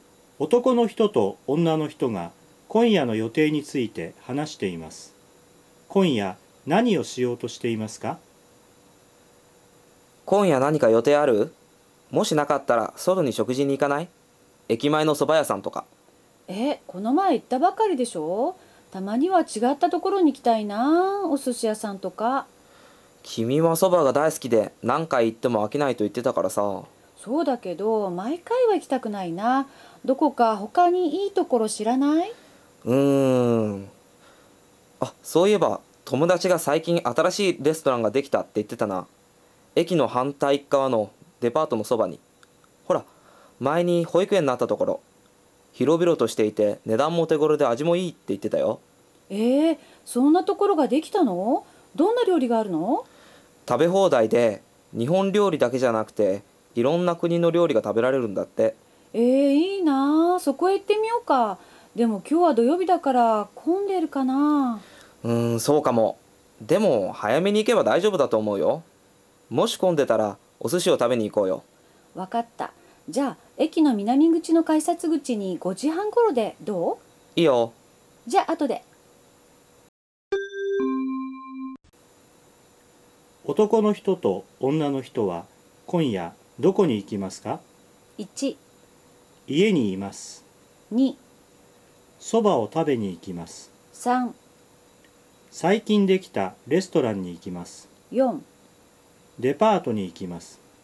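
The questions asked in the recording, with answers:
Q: 男の人と女の人は今夜どこに行きますか?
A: 3: 最近できたレストランに行きます。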